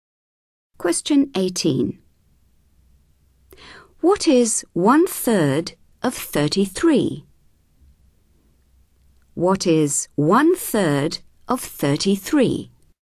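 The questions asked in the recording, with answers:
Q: What is 1/3 of 33?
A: 11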